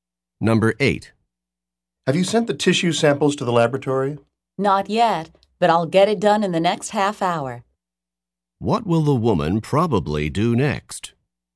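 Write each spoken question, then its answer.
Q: What will the woman probably do next?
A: Send the tissue samples to the laboratory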